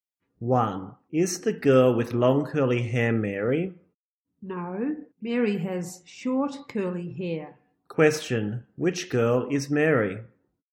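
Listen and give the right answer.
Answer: The girl with short curly hair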